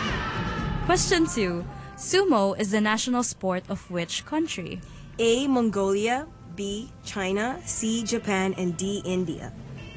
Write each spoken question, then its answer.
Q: Sumo is the national sport of which country?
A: Yes, Japan.